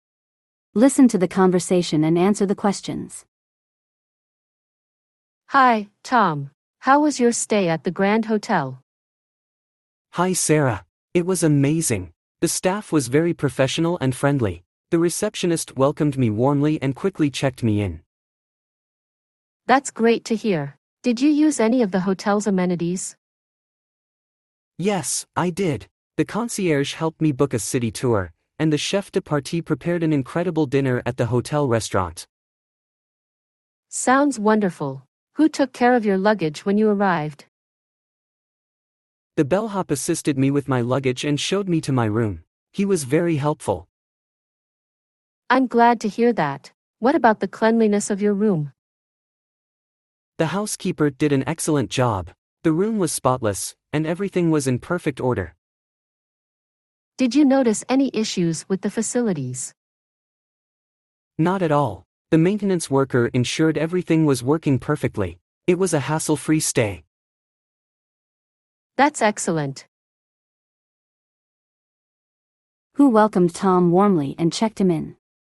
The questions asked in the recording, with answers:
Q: Who welcomed Tom warmly and checked him in?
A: The receptionist.